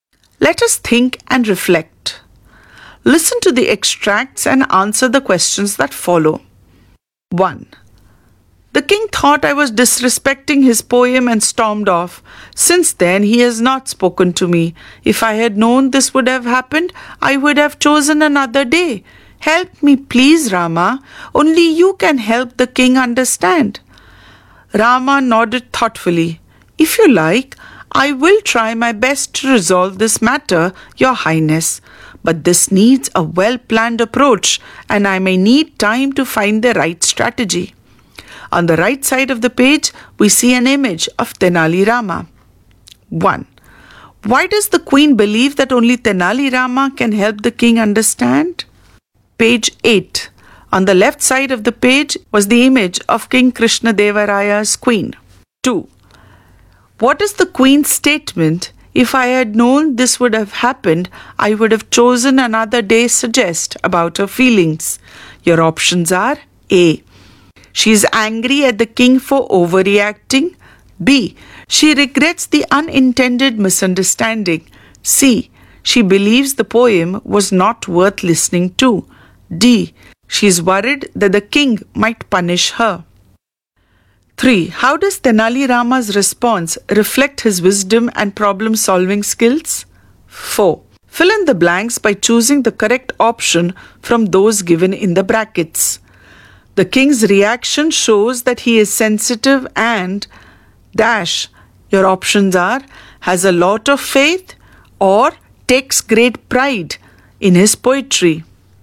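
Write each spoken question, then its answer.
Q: What is the queen's statement, "If I had known this would have happened, I would have chosen another day," suggest about her feelings?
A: B: She regrets the unintended misunderstanding.

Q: The king's reaction shows that he is sensitive and - your options are has a lot of faith or takes great pride in his poetry.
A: takes great pride in his poetry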